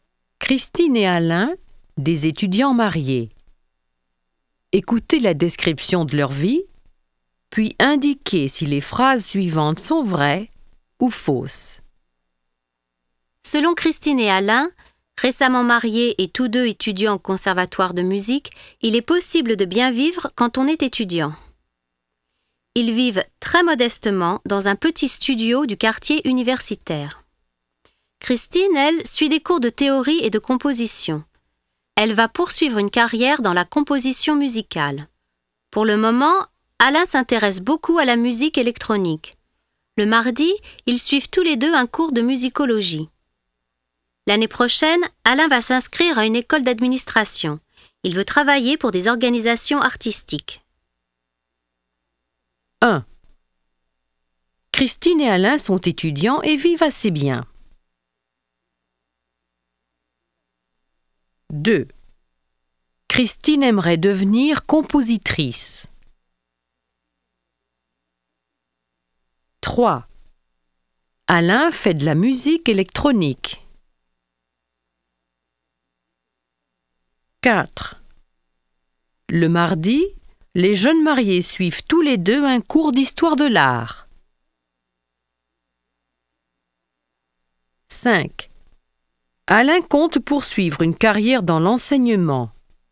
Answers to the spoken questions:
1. 1. Vrai.
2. 2. Vrai.
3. 3. Vrai.
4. 4. Faux.
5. 5. Faux.